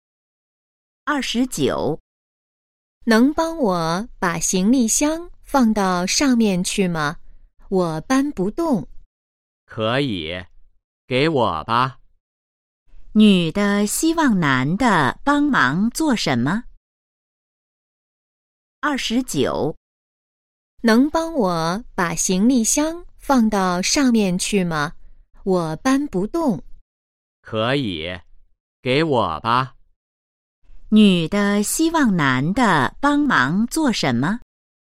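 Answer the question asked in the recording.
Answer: 把行李箱放到上面去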